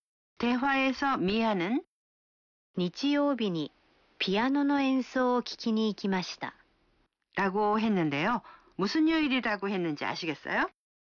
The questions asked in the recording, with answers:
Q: 무슨요일이라고했는지아시겠어요?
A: 일요일이요.